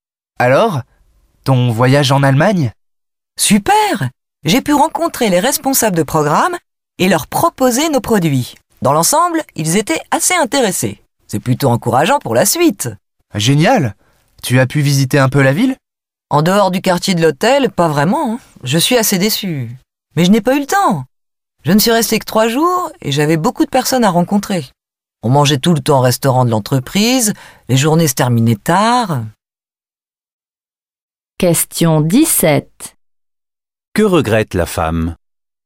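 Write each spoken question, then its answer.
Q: Que regrette la femme?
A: De ne pas avoir pu visiter la ville (faute de temps)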